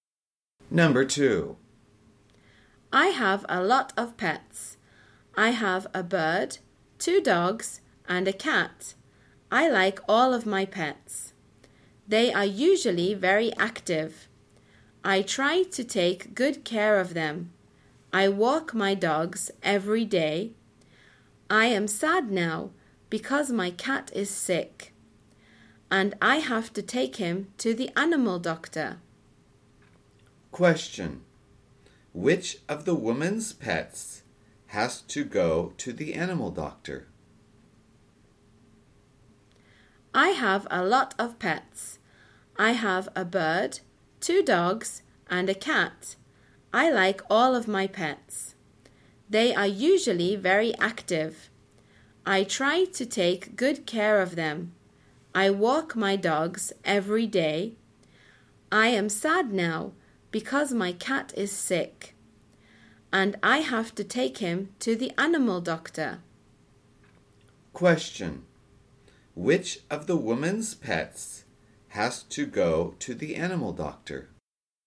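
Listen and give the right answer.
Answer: Her cat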